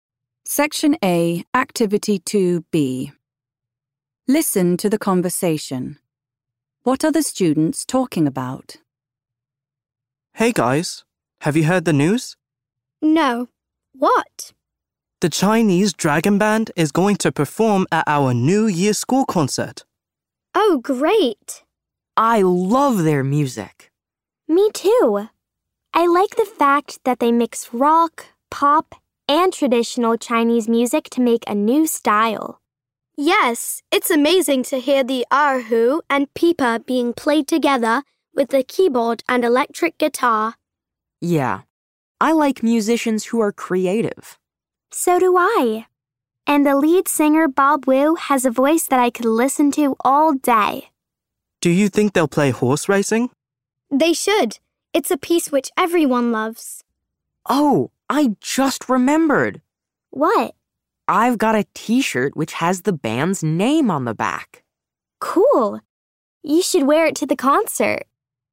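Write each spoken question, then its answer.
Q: What are the students talking about?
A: The Chinese Dragon Band performing at the New Year school concert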